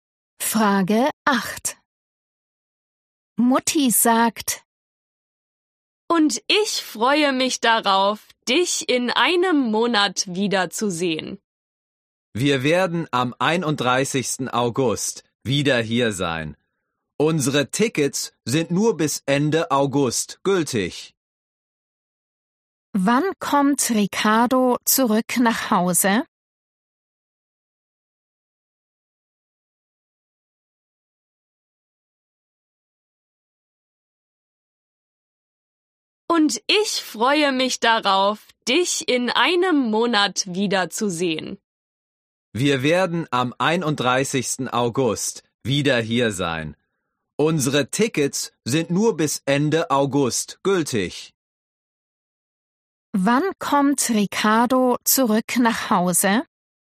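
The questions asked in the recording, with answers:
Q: Wann kommt Ricardo zurück nach Hause?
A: am 31. August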